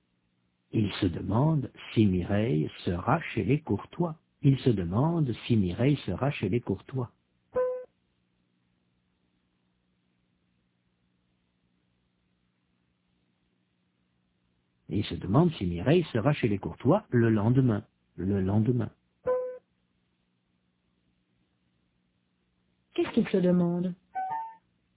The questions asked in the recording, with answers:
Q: Qu'est-ce qu'il se demande ?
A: Si Mireille sera chez les Courtois le lendemain.